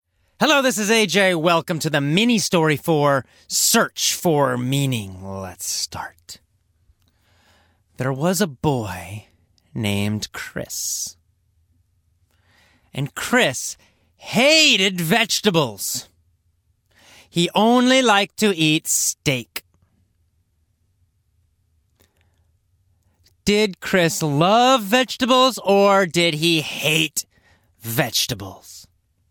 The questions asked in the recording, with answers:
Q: Did Chris love vegetables or did he hate vegetables?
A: Well, Chris hated vegetables.